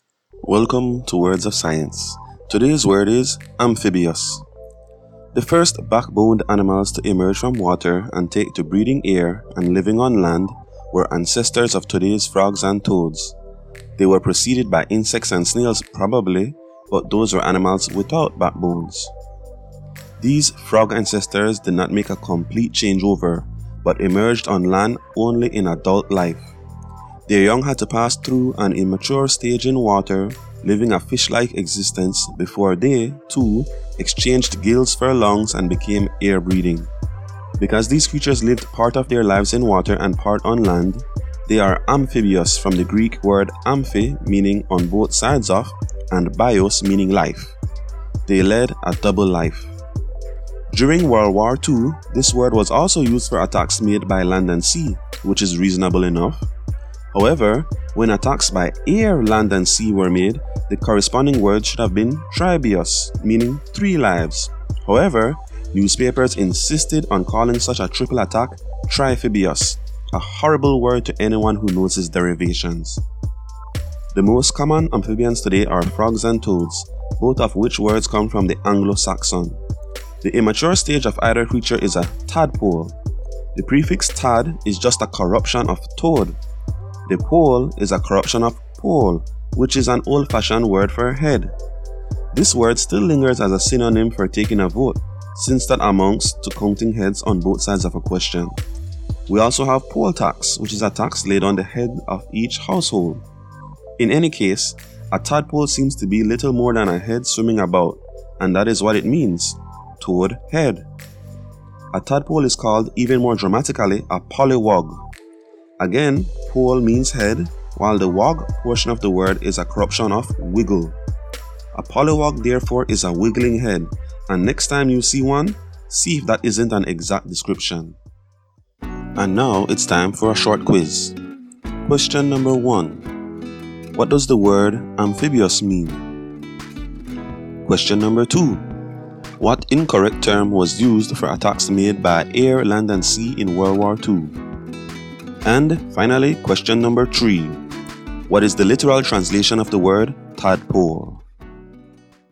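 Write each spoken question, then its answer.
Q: What does the word amphibious mean?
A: Living a double life, part in water and part on land (on both sides of life)

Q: What incorrect term was used for attacks made by air, land and sea in World War II?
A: Triphibious

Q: What is the literal translation of the word tadpole?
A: Toad head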